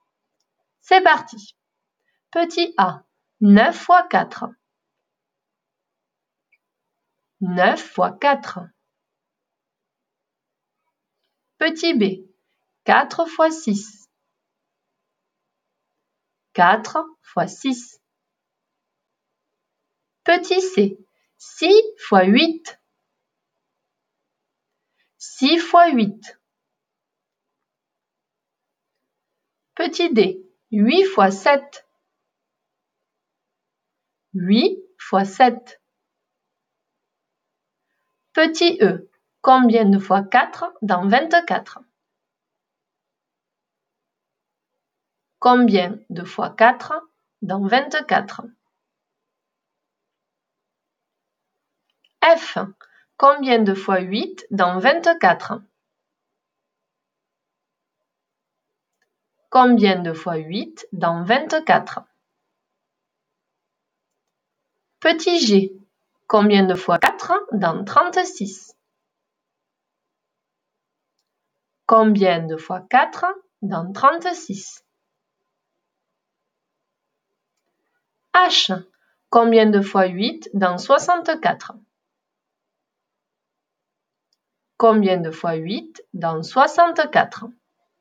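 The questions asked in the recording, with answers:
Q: 9 fois 4.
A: 36

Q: 4 fois 6.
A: 24

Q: 6 fois 8.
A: 48

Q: 8 fois 7.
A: 56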